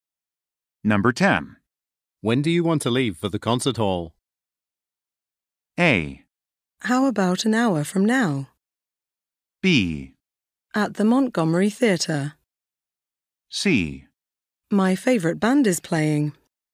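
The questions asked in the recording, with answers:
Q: When do you want to leave for the concert hall?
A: A: How about an hour from now?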